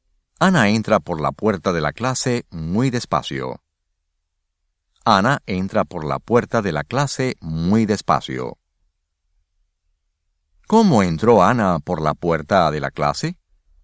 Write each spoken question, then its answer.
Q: ¿Cómo entró Ana por la puerta de la clase?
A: Ana entró por la puerta de la clase muy despacio.